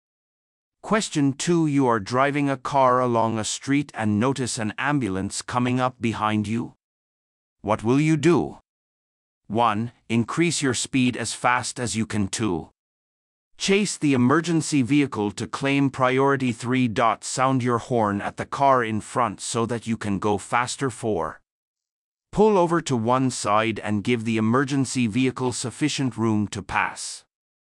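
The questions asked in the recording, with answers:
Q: What will you do?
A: 4: Pull over to one side and give the emergency vehicle sufficient room to pass.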